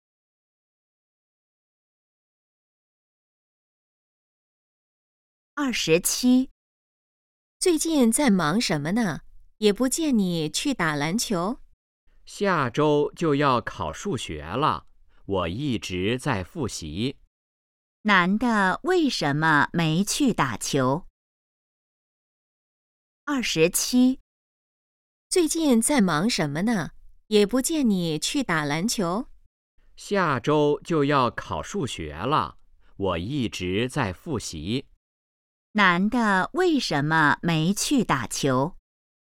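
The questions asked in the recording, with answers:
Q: 男的为什么没去打球?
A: 在复习,准备数学考试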